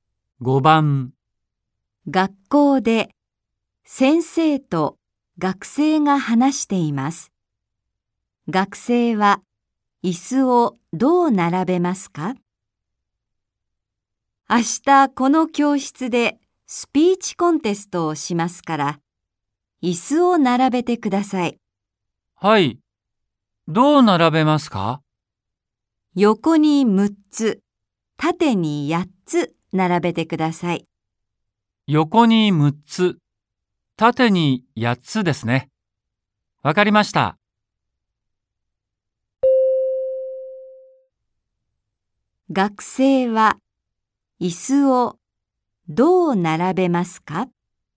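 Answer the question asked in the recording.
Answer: 横に6つ、縦に8つ並べる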